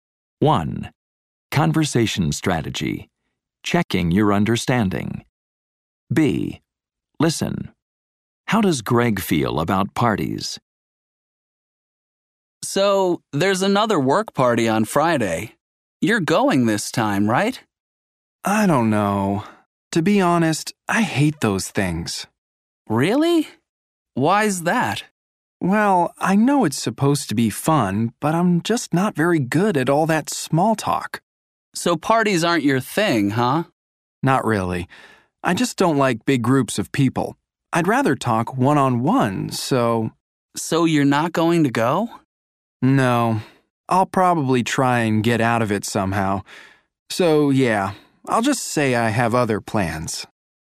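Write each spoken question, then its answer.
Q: How does Greg feel about parties?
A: He hates them; he's not good at small talk and doesn't like big groups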